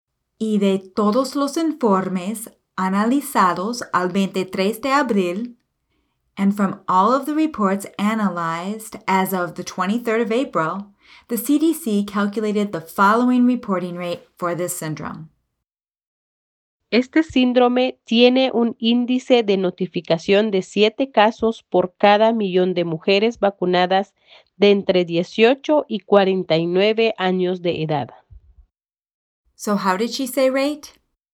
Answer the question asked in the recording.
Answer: El índice.